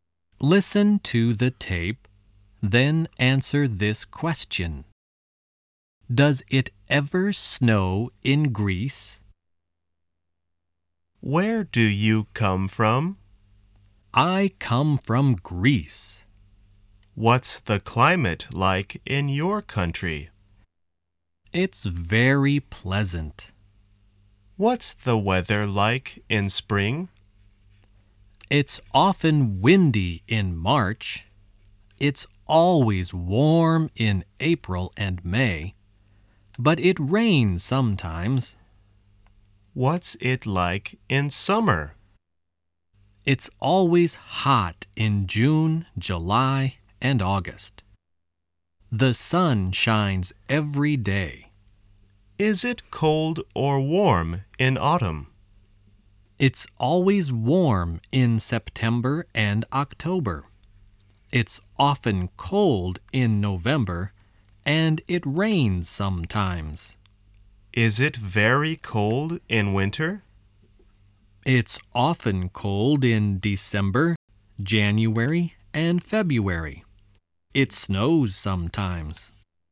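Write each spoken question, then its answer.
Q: Does it ever snow in Greece?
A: Yes, it snows sometimes (in winter).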